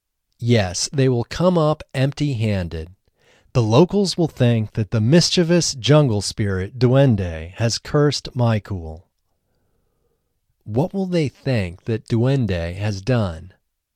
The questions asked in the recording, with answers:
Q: What will they think that Duende has done?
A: They will think that Duende has cursed Michael.